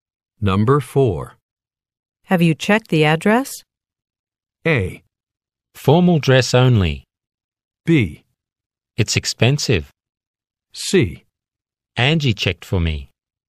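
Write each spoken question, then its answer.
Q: Have you checked the address?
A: C: Angie checked for me.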